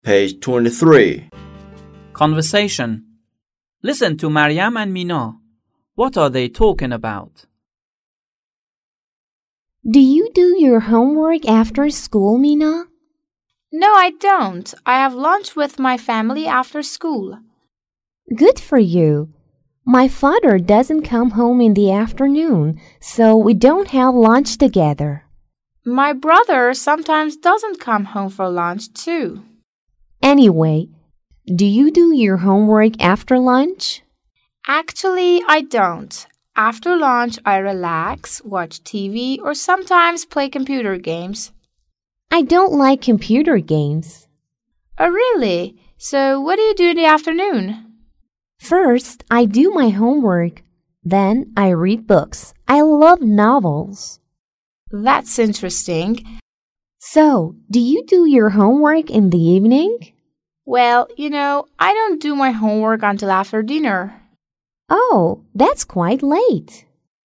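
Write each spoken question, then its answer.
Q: What are they talking about?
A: What they do after school, like when they do their homework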